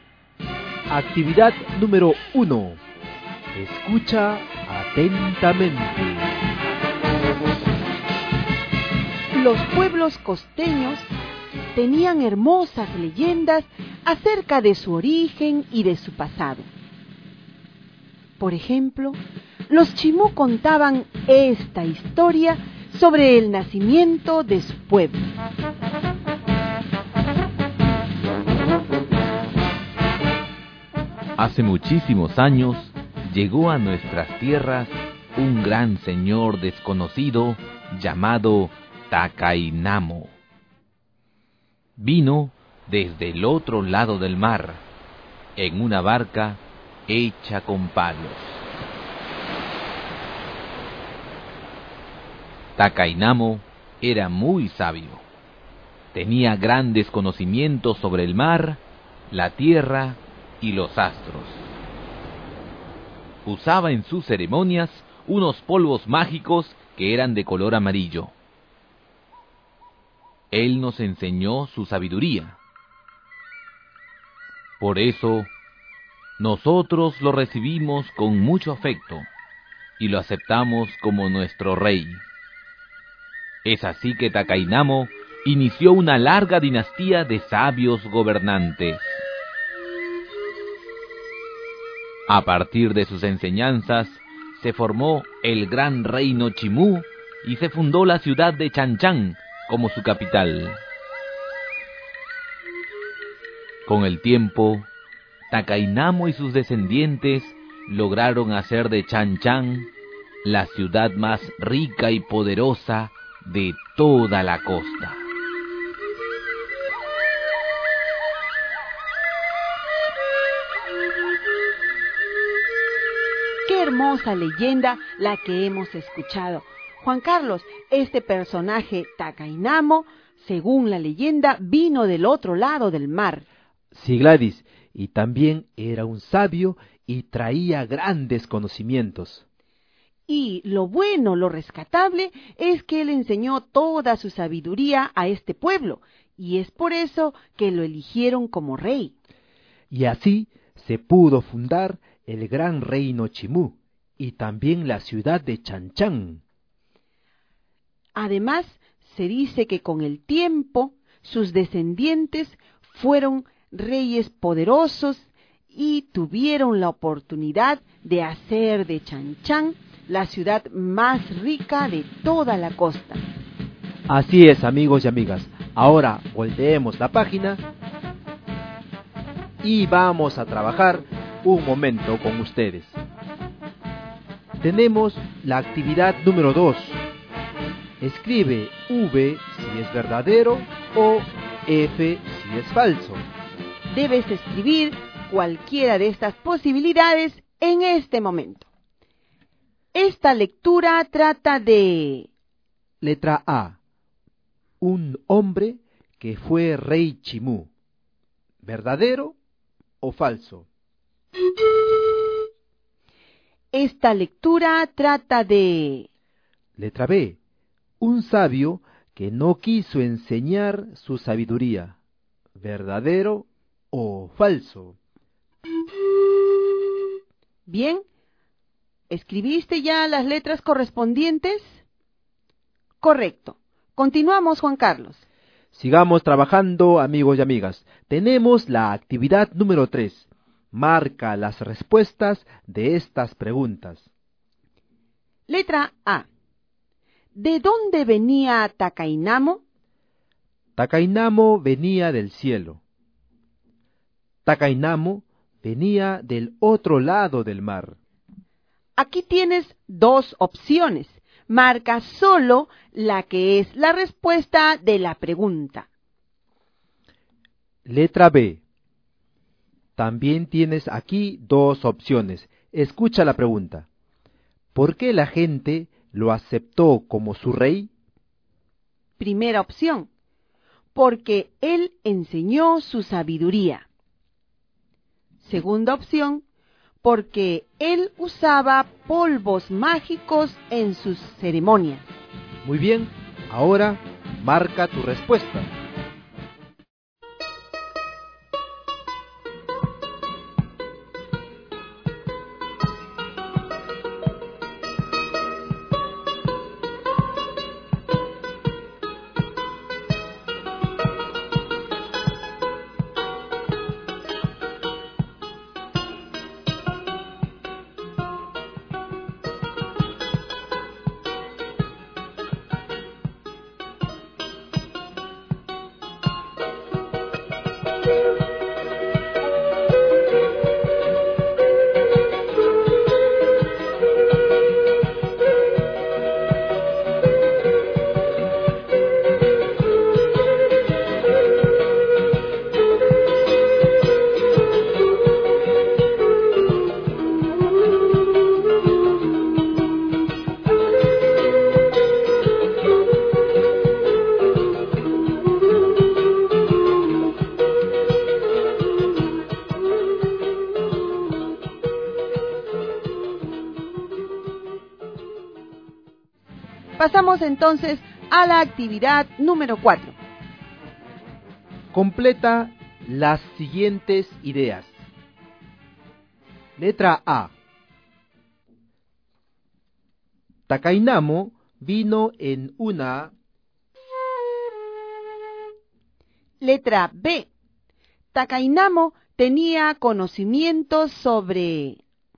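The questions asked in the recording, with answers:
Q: Esta lectura trata de... Letra A. Un hombre que fue rey Chimú. ¿Verdadero o falso?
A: Verdadero

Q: Esta lectura trata de... Letra B. Un sabio que no quiso enseñar su sabiduría. ¿Verdadero o falso?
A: Falso

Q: ¿De dónde venía Takainamo?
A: Takainamo venía del otro lado del mar.

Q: ¿Por qué la gente lo aceptó como su rey?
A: Porque él enseñó su sabiduría.

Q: Takainamo vino en una...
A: barca hecha con palos

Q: Takainamo tenía conocimientos sobre...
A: el mar, la tierra y los astros

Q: Takainamo inició una larga dinastía de...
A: sabios gobernantes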